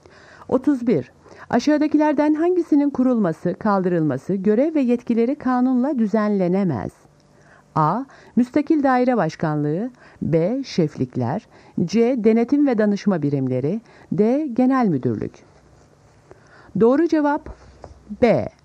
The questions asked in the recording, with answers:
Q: Aşağıdakilerden hangisinin kurulması, kaldırılması, görev ve yetkileri kanunla düzenlenemez?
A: Doğru cevap B. Şeflikler.